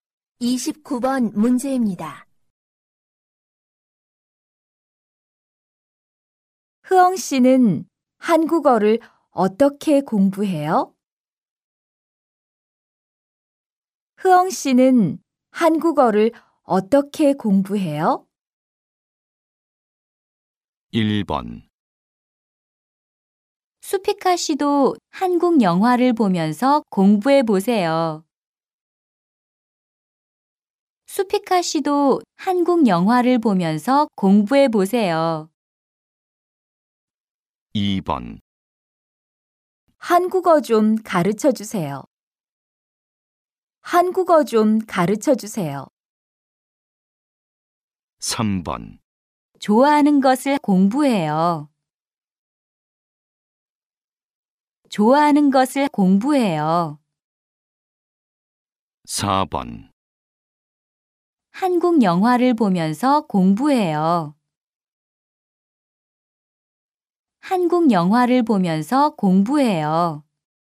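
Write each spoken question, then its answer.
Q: 흐엉 씨는 한국어를 어떻게 공부해요?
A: 4: 한국 영화를 보면서 공부해요.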